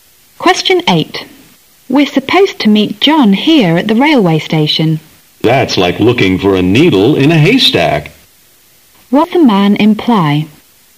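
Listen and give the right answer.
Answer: It will be very hard to find John at the station.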